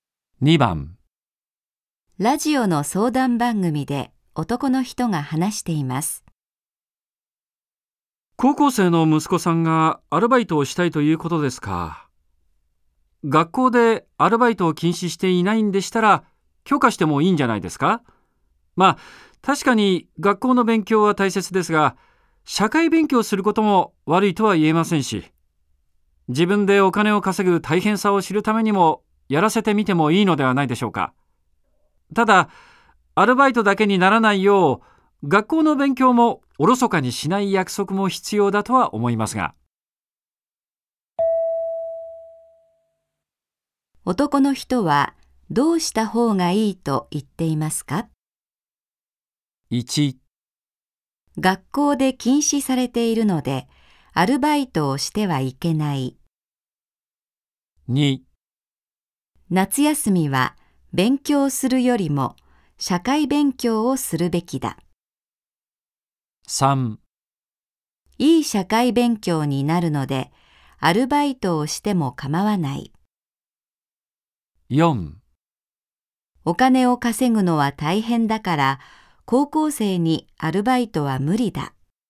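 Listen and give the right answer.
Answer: 3: いい社会勉強になるのでアルバイトをしても構わない。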